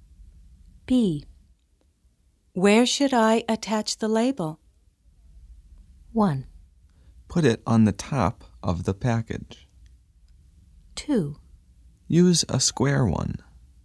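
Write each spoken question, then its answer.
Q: Where should I attach the label?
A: 1: Put it on the top of the package.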